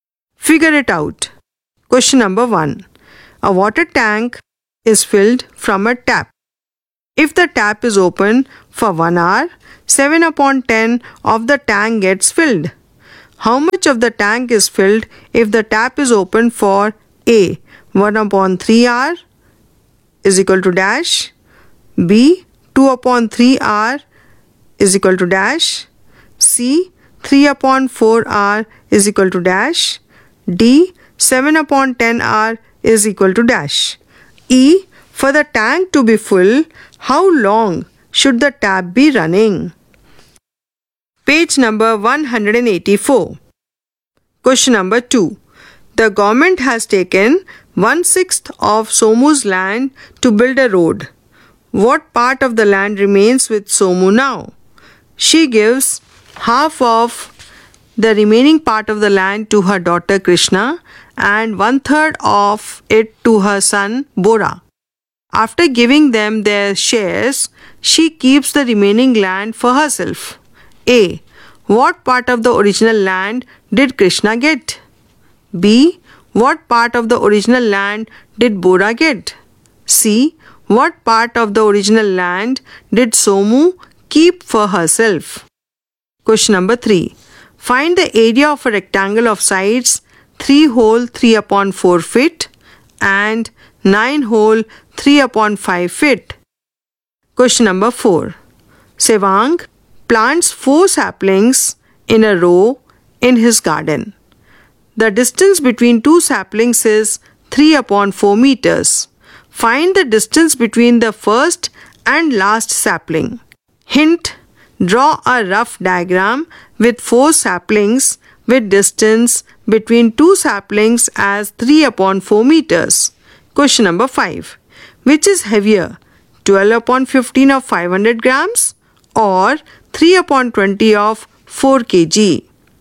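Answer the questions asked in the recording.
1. A 7/30, B 7/15, C 21/40, D 49/100
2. 10/7 hours
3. 5/6
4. 5/12
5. 5/18
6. 5/36
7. 36 square feet
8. 9/4 meters
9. 3/20 of 4 kg (600 g vs 400 g)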